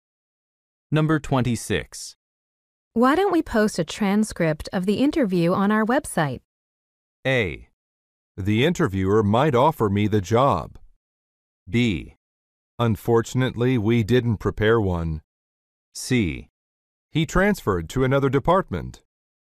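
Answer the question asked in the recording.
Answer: B: Unfortunately, we didn't prepare one.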